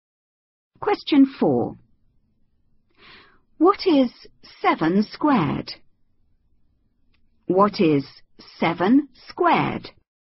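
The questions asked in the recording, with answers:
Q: What is 7 squared?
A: 49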